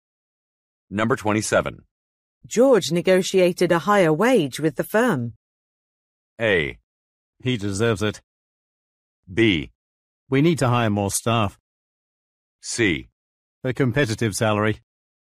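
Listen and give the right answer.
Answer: A: He deserves it.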